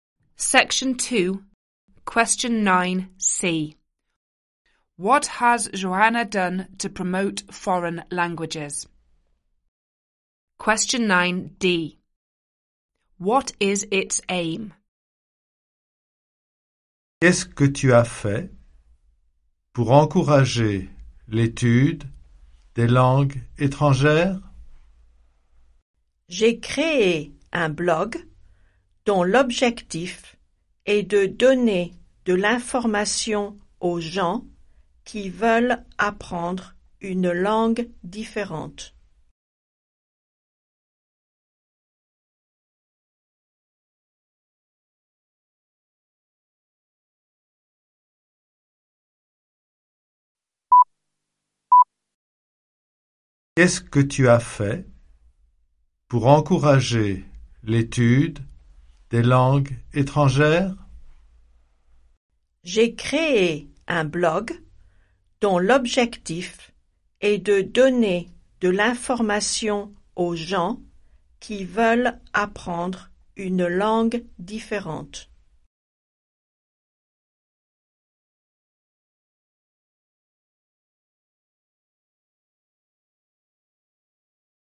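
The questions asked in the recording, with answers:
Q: What has Joanna done to promote foreign languages?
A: She created a blog

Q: What is its aim?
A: To give information to people who want to learn a different language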